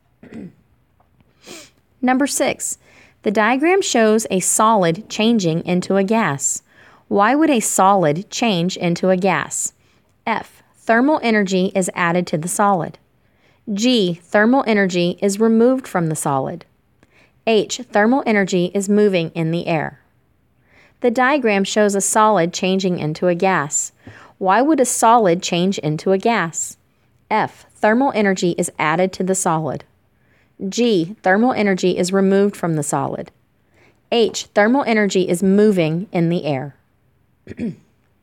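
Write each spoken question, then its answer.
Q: Why would a solid change into a gas?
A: F: Thermal energy is added to the solid.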